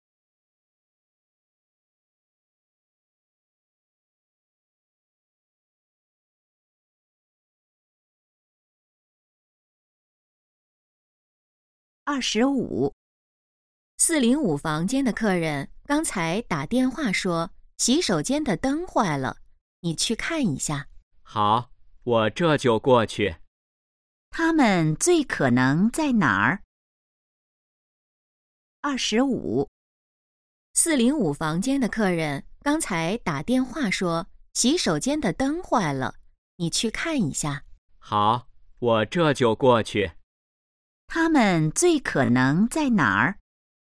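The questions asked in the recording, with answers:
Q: 他们最可能在哪儿?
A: 宾馆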